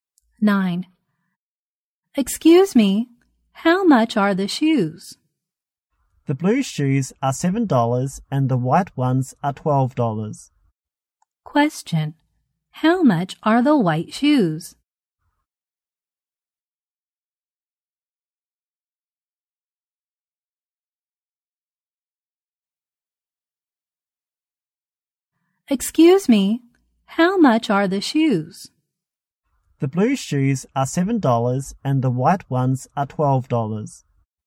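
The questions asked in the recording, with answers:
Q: Question, how much are the white shoes?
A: $12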